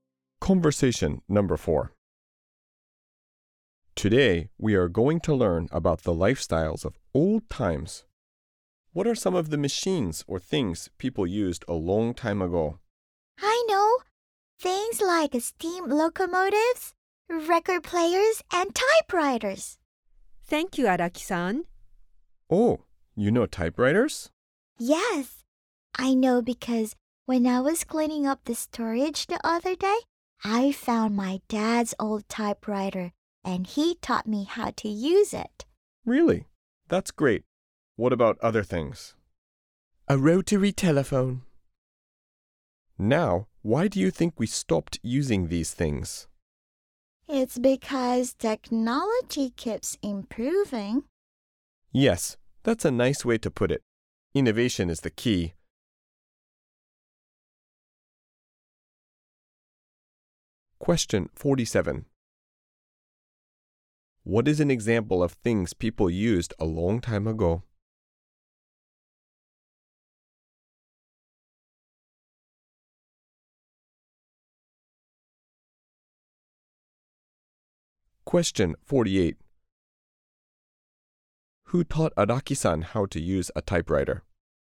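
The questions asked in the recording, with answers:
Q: What is an example of things people used a long time ago?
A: Steam locomotives (also record players, typewriters, rotary telephones)

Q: Who taught Araki-san how to use a typewriter?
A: Her dad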